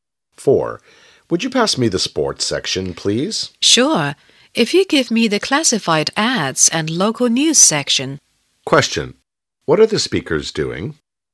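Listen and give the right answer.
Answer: Reading a newspaper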